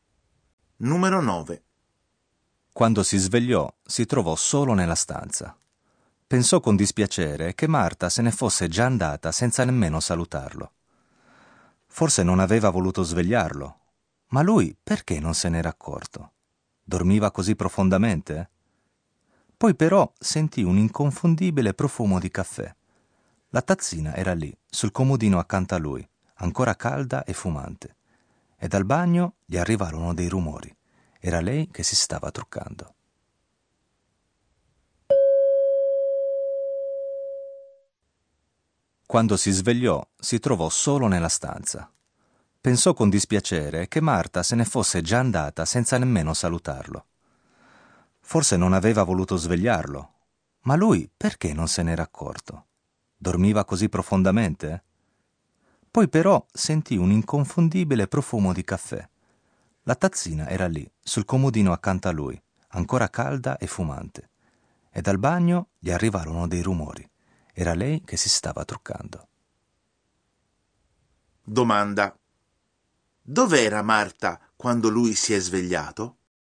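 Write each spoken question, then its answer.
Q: Dov'era Marta quando lui si è svegliato?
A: In bagno, a truccarsi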